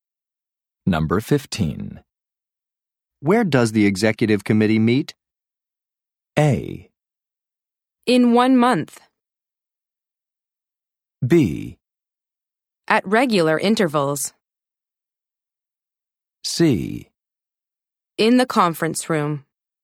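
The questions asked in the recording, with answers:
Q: Where does the executive committee meet?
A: C: In the conference room.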